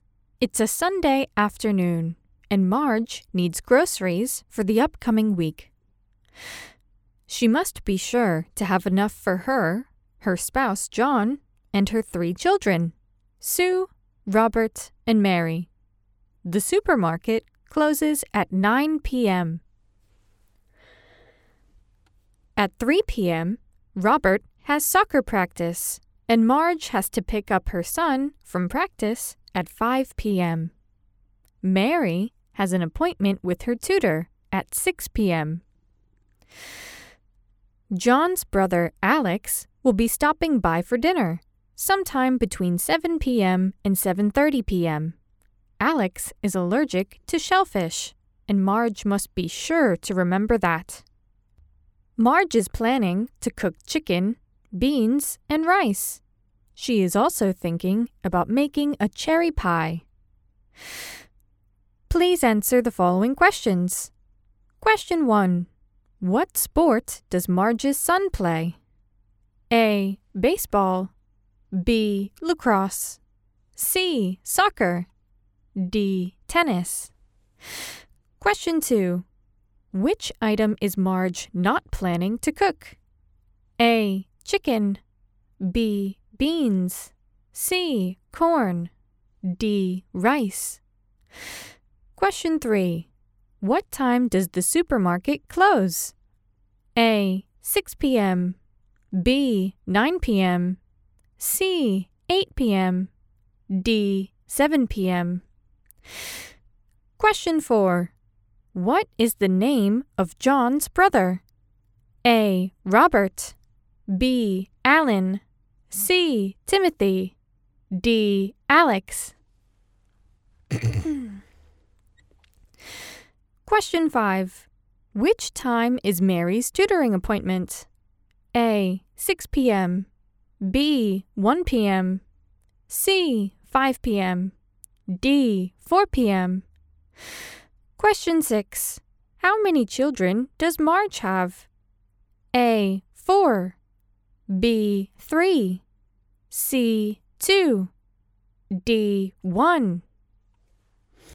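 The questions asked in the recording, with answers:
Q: What sport does Marge's son play?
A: C: Soccer.

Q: Which item is Marge not planning to cook?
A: C: Corn.

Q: What time does the supermarket close?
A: B: 9 p.m.

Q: What is the name of John's brother?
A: D: Alex.

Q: Which time is Mary's tutoring appointment?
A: A: 6 p.m.

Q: How many children does Marge have?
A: B: 3.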